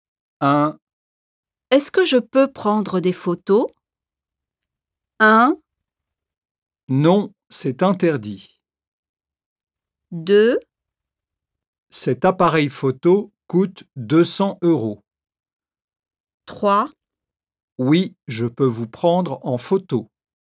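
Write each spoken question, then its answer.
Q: Est-ce que je peux prendre des photos?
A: 1: Non, c'est interdit.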